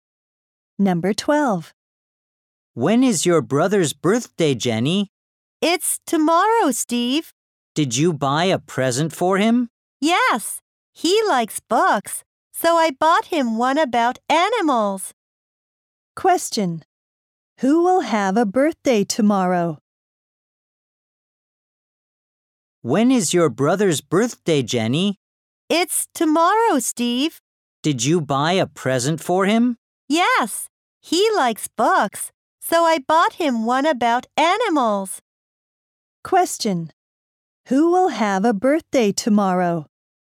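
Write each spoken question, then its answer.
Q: Who will have a birthday tomorrow?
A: Jenny's brother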